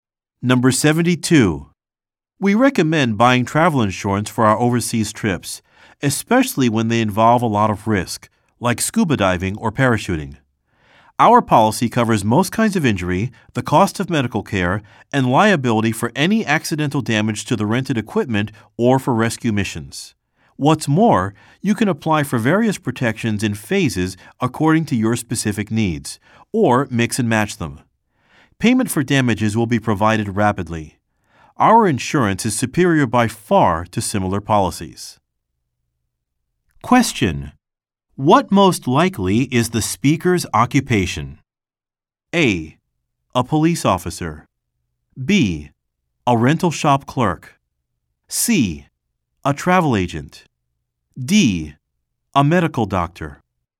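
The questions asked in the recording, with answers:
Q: What most likely is the speaker's occupation?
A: C: A travel agent.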